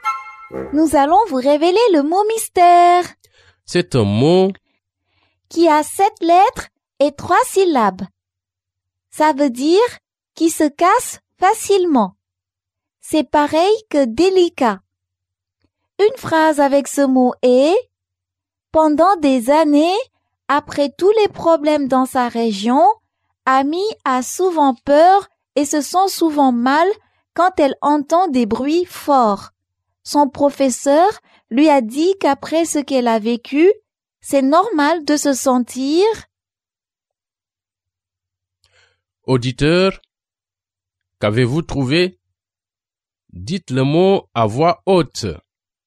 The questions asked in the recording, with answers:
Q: Auditeur, qu'avez-vous trouvé?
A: Le mot mystère est fragile.